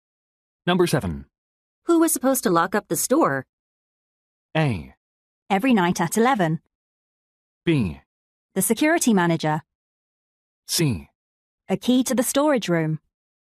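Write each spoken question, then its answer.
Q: Who was supposed to lock up the store?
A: B: The security manager.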